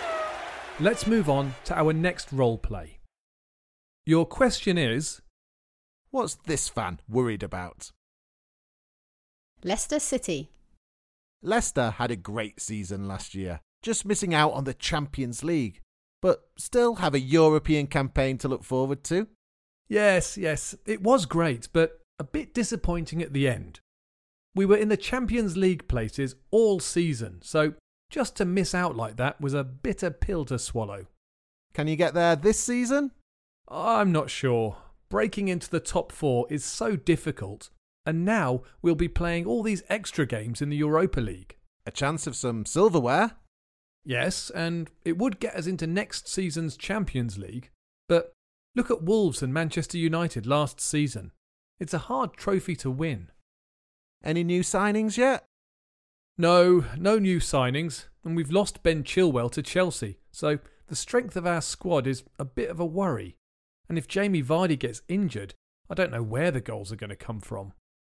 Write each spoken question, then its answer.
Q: what's this fan worried about?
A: But he was probably most worried about the possibility of Jamie Vardy getting injured.